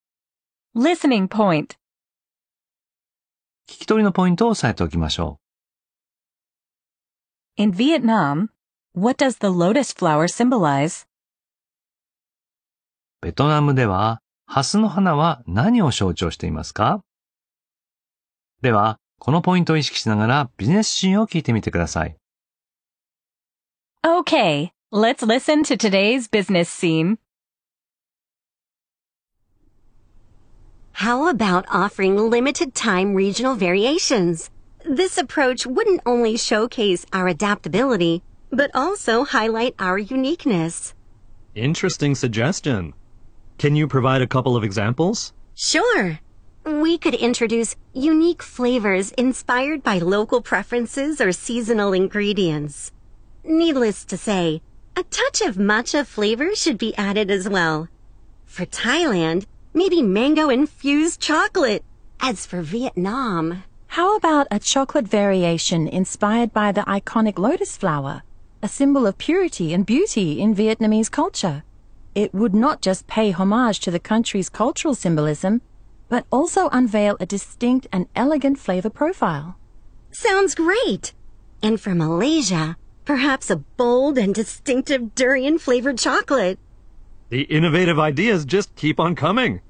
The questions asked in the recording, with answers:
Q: In Vietnam, what does the lotus flower symbolize?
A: It's a symbol of purity and beauty.